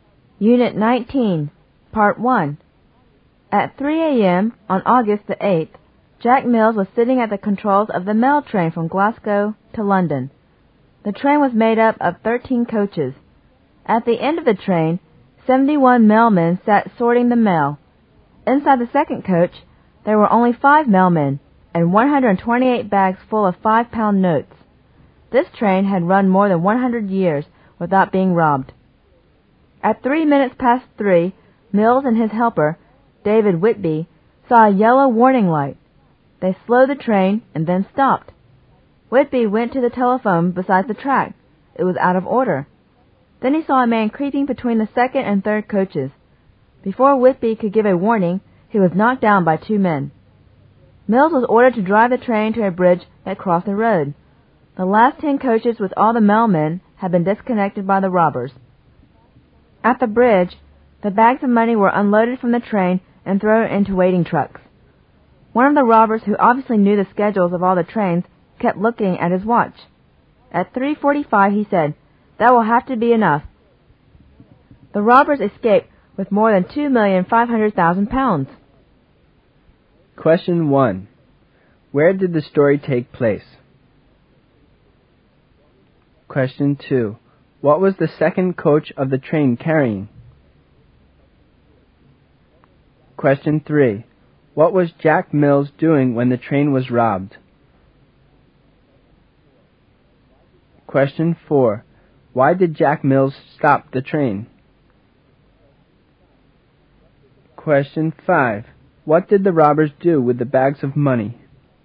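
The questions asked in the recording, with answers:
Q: Where did the story take place?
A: On the mail train from Glasgow to London

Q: What was the second coach of the train carrying?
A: 5 mailmen and 128 bags full of 5-pound notes

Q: What was Jack Mills doing when the train was robbed?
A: Driving the train (sitting at the controls)

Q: Why did Jack Mills stop the train?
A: He saw a yellow warning light

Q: What did the robbers do with the bags of money?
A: Unloaded them and threw them into waiting trucks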